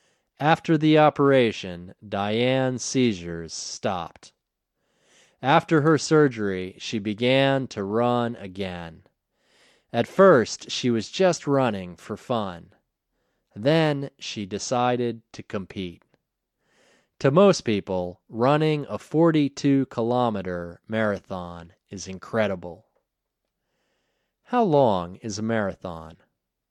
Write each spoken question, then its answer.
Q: How long is a marathon?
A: A marathon is 42 kilometers.